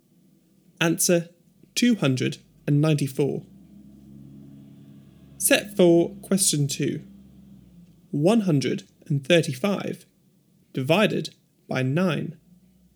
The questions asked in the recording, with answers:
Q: 135 divided by 9.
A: 15.